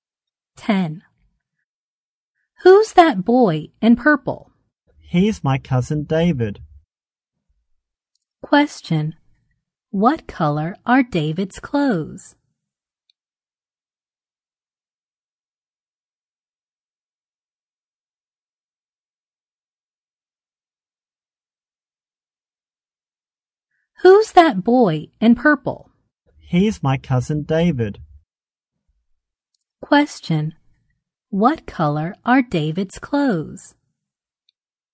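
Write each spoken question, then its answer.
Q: Question: What color are David's clothes?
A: Purple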